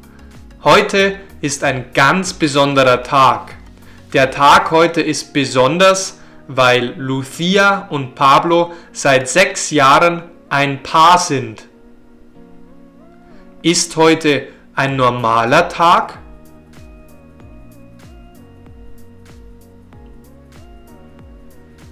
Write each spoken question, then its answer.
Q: Ist heute ein normaler Tag?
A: Nein, heute ist kein normaler Tag.